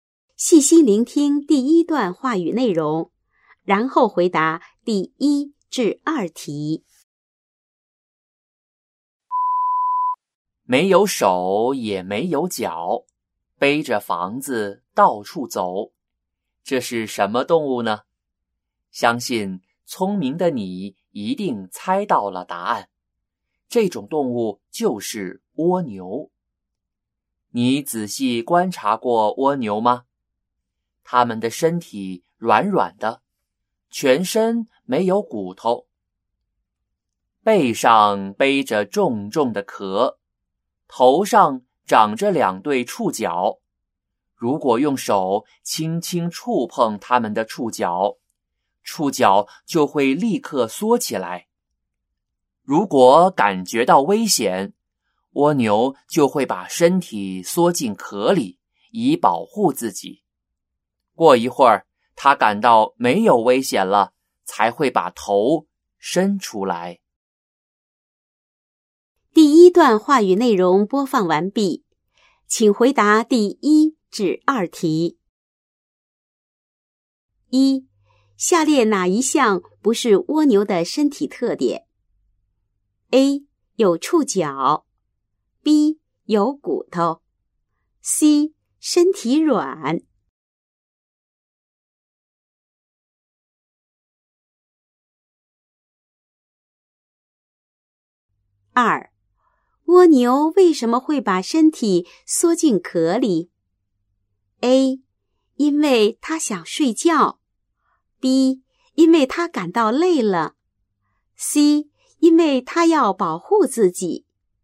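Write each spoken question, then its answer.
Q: 下列哪一项不是蜗牛的身体特点?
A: B: 有骨头

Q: 蜗牛为什么会把身体缩进壳里?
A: C: 因为他要保护自己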